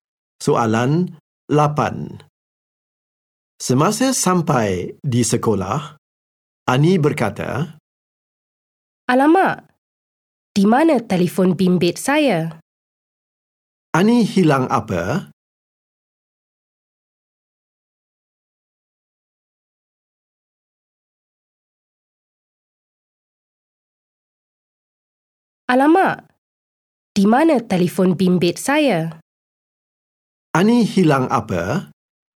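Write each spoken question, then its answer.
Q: Ani hilang apa?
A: Telefon bimbit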